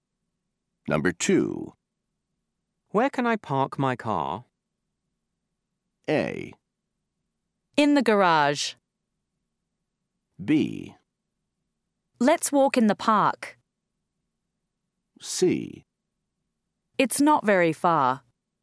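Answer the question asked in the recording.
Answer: A: In the garage.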